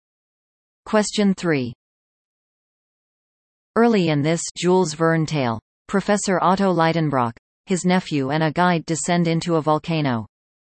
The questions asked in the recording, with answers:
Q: Early in this Jules Verne tale, Professor Otto Leidenbrock, his nephew and a guide descend into a volcano.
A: The answer? Journey to the Center of the Earth.